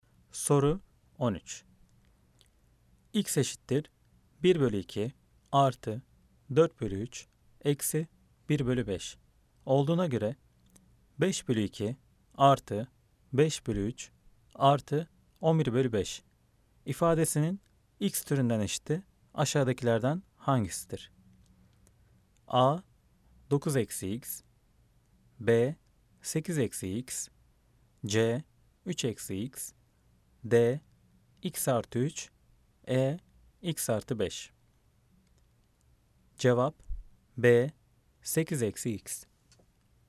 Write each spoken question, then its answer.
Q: X eşittir 1 bölü 2 artı 4 bölü 3 eksi 1 bölü 5 olduğuna göre 5 bölü 2 artı 5 bölü 3 artı 11 bölü 5 ifadesinin X türünden eşiti aşağıdakilerden hangisidir?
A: Cevap B. 8 eksi X.